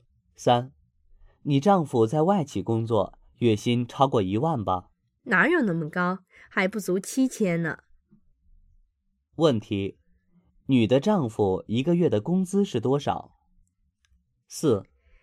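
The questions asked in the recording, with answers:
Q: 女的丈夫一个月的工资是多少?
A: 不足7000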